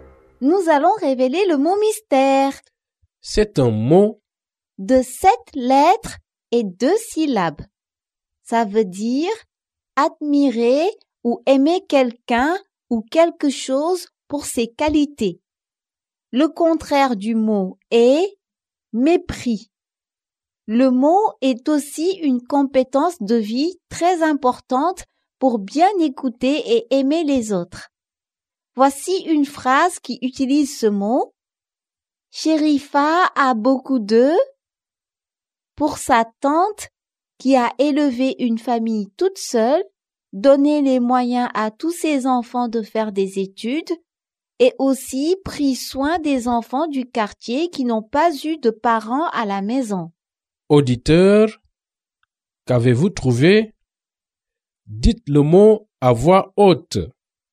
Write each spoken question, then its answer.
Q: Auditeur, qu'avez-vous trouvé?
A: Le mot mystère est respect.